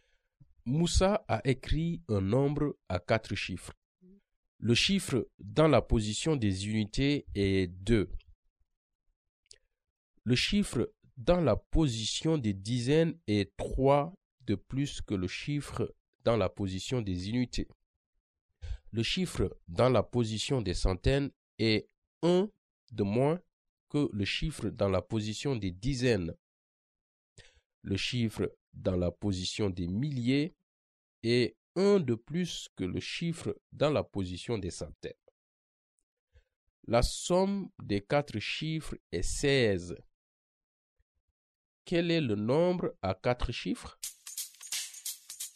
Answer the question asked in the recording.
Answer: 5452.